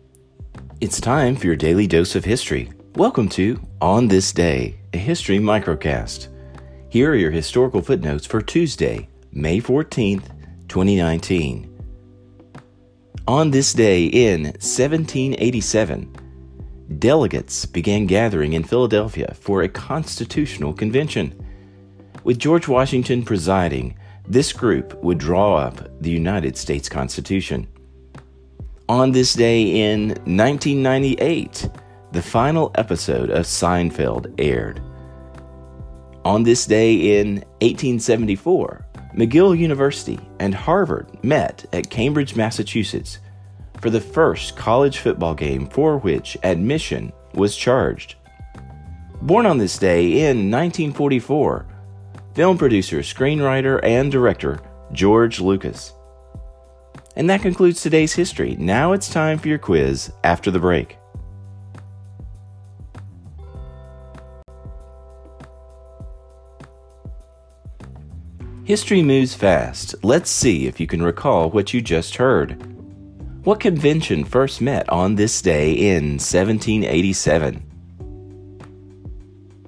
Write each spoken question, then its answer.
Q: What convention first met on this day in 1787?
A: the United States Constitutional Convention.